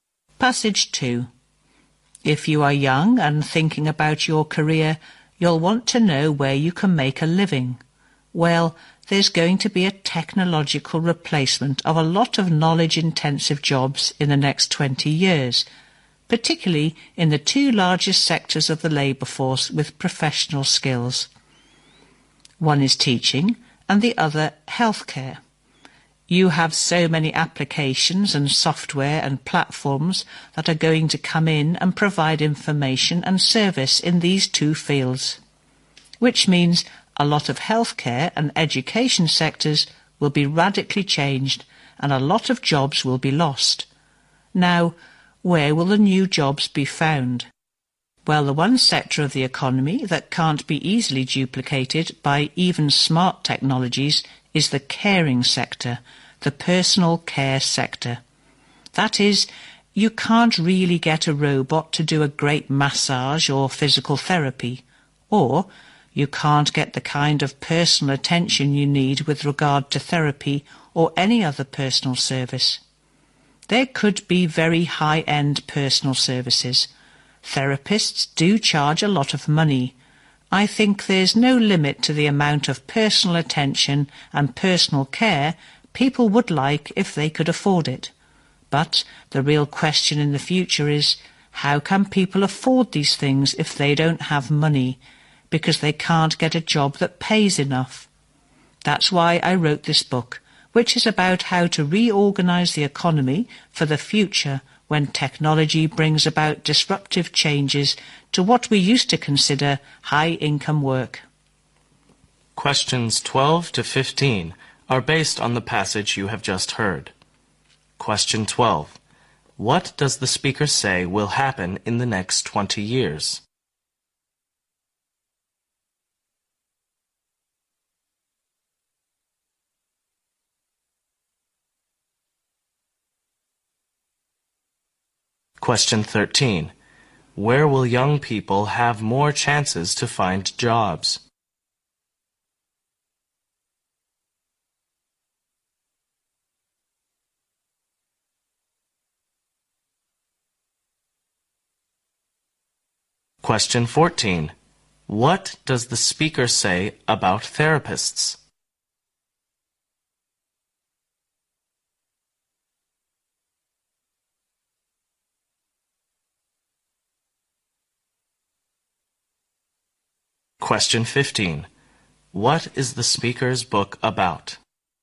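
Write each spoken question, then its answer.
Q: What does the speaker say will happen in the next 20 years?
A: Technology will replace many knowledge-intensive jobs, especially in teaching and healthcare

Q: Where will young people have more chances to find jobs?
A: In the personal care sector

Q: What does the speaker say about therapists?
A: They charge a lot of money

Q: What is the speaker's book about?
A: How to reorganise the economy for a future of disruptive technological change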